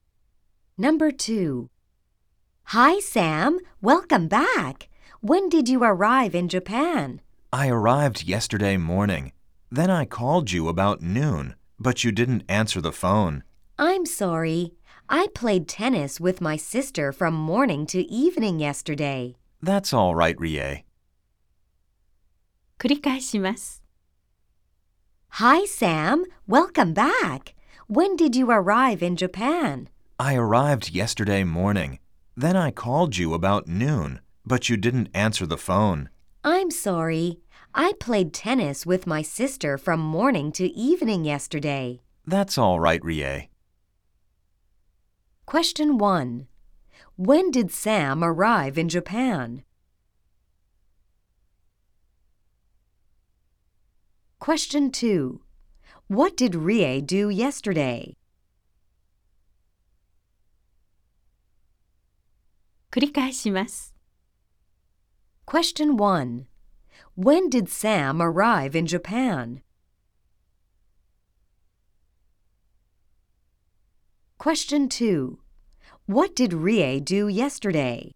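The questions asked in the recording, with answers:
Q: When did Sam arrive in Japan?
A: Yesterday morning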